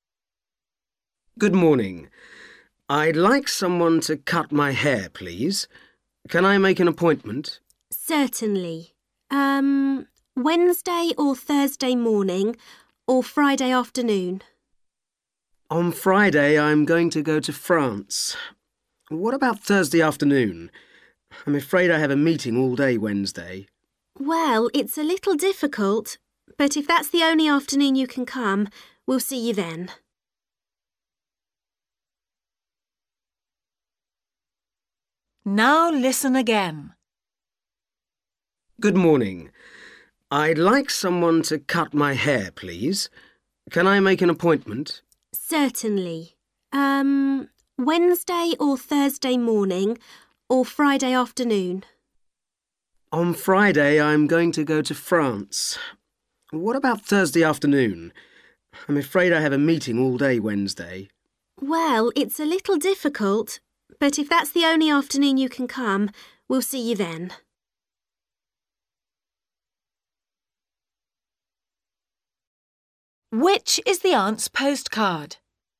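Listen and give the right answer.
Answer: Thursday afternoon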